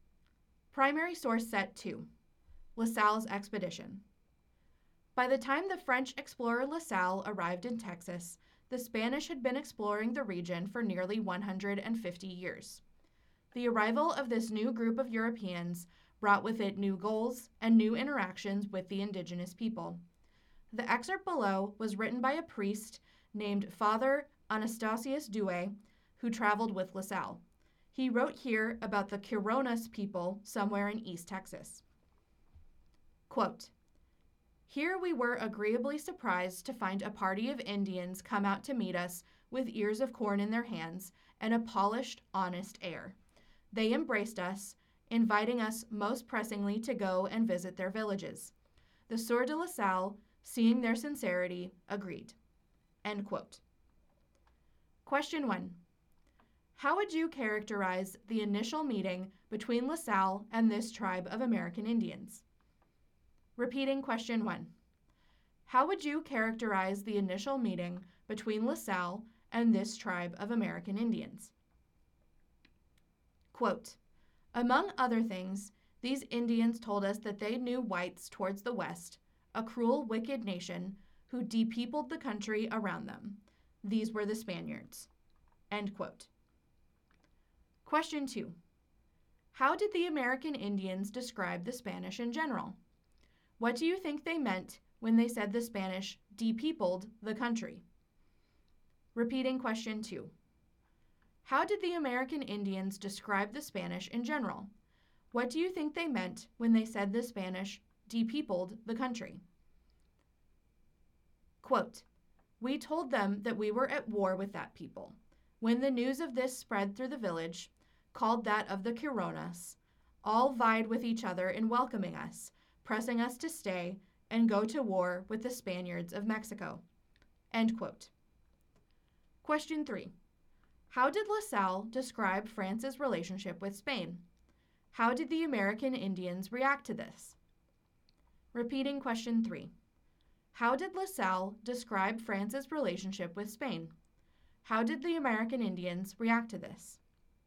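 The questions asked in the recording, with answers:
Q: How would you characterize the initial meeting between La Salle and this tribe of American Indians?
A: Friendly and welcoming

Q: How did the American Indians describe the Spanish in general?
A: As a cruel, wicked nation that depeopled the country

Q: How did La Salle describe France's relationship with Spain?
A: At war with Spain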